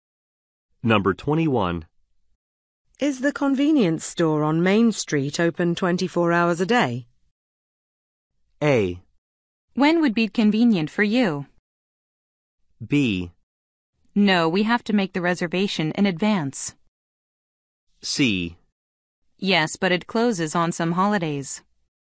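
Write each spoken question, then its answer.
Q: Is the convenience store on Main Street open 24 hours a day?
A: C: Yes, but it closes on some holidays.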